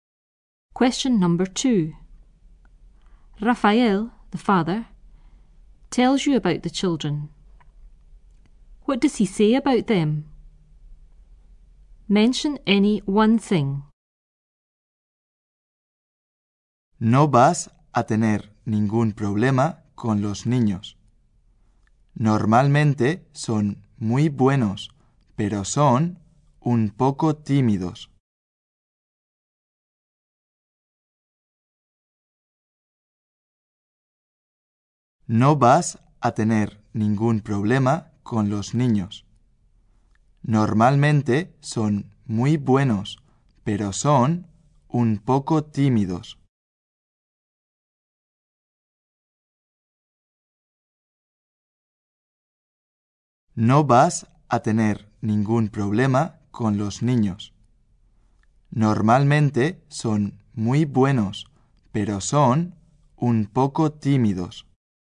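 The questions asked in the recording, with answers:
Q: What does he say about them?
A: They are normally very good / a bit shy; you won't have any problems with them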